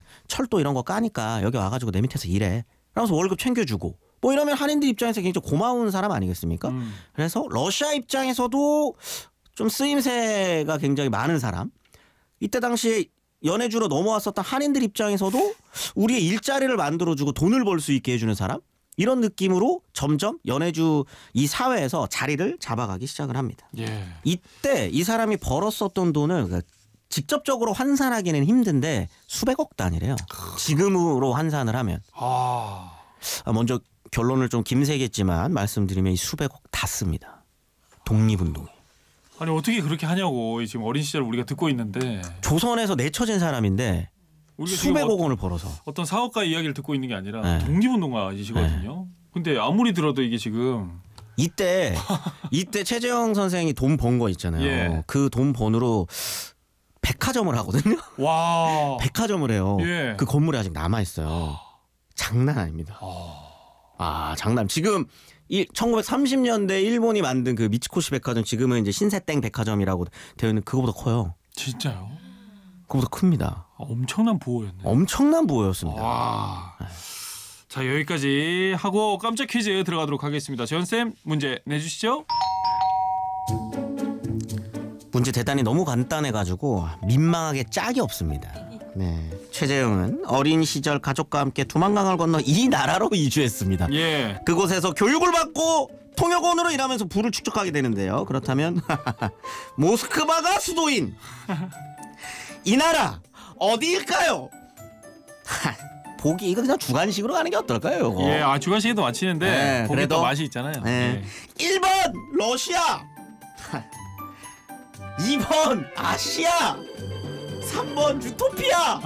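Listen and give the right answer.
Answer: 1번: 러시아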